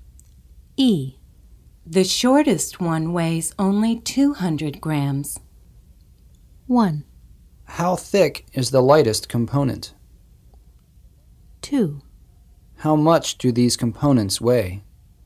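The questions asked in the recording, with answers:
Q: How much do these components weigh?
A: 2: How much do these components weigh?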